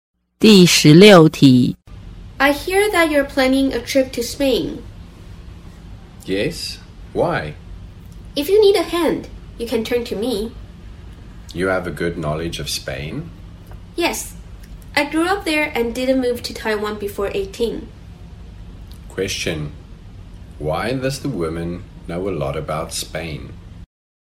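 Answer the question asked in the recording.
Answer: She grew up there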